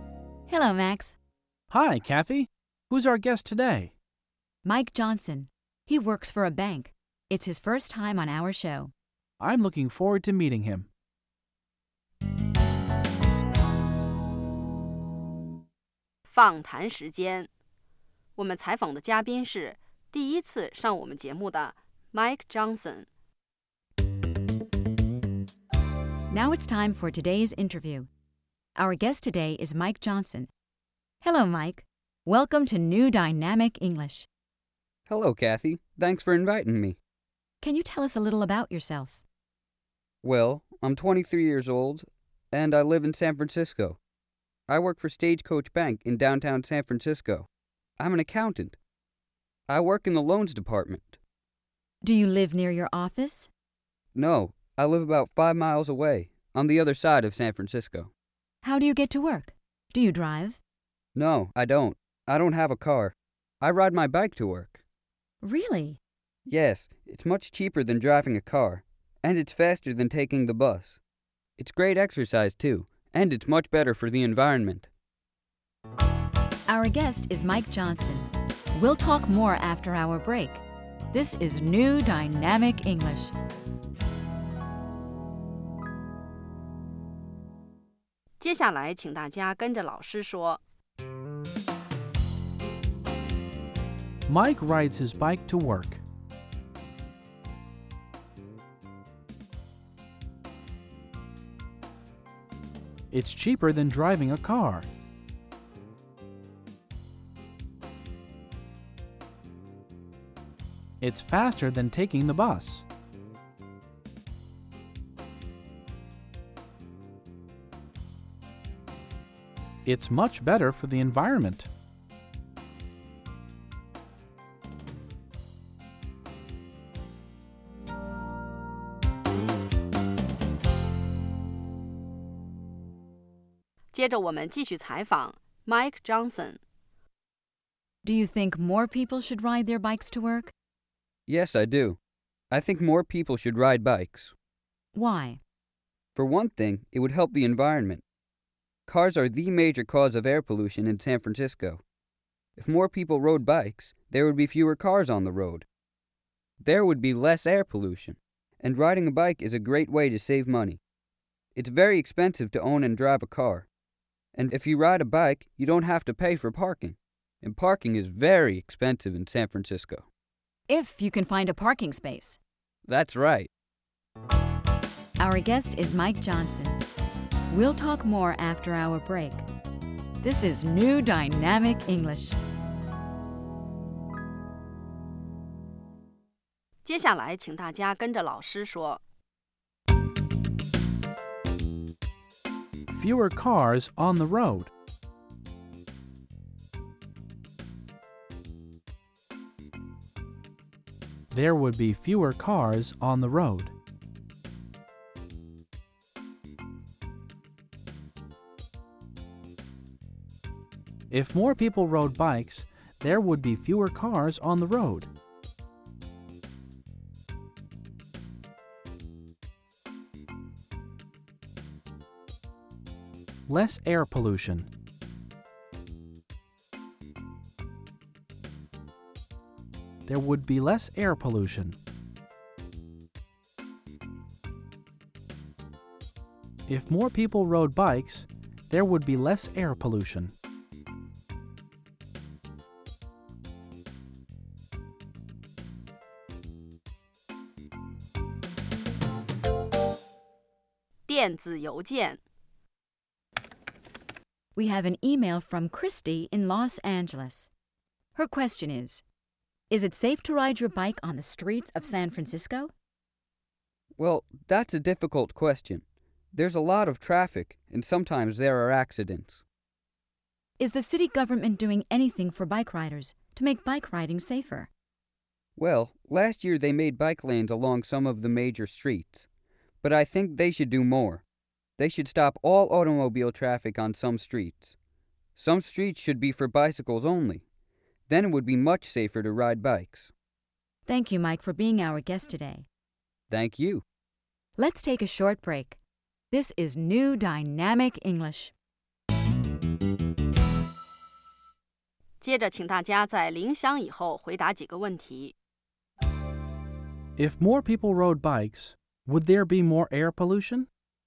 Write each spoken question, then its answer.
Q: If more people rode bikes, would there be more air pollution?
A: No, there wouldn't. There would be less air pollution because there would be fewer cars.